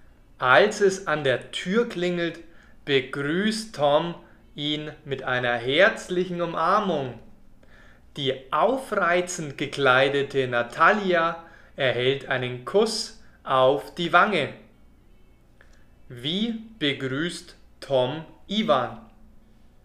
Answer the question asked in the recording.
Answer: Mit einer herzlichen Umarmung.